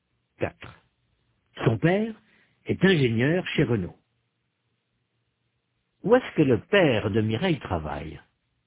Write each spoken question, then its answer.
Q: Où est-ce que le père de Mireille travaille?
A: Chez Renault.